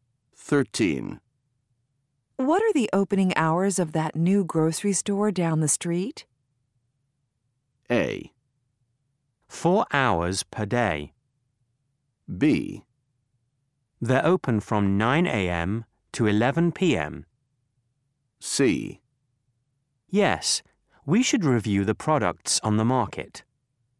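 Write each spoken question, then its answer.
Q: What are the opening hours of that new grocery store down the street?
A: B: They're open from 9 a.m. to 11 p.m.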